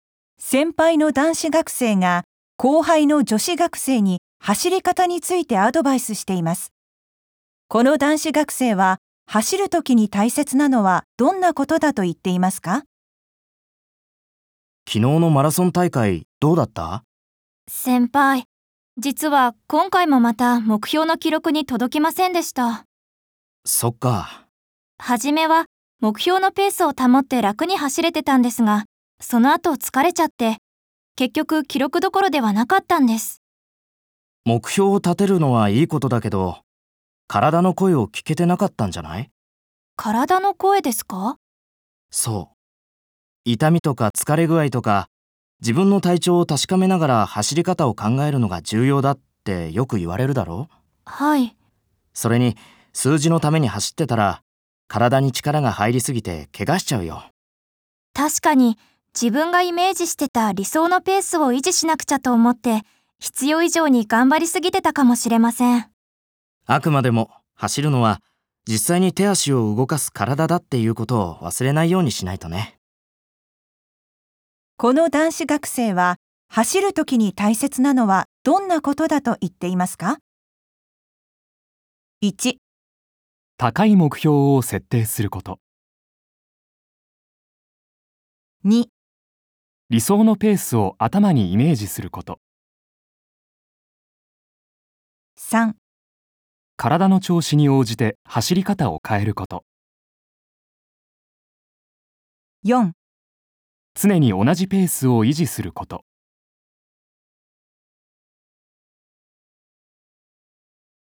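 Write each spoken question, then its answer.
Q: この男子学生は走るときに大切なのはどんなことだと言っていますか?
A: 3: 体の調子に応じて走り方を変えること。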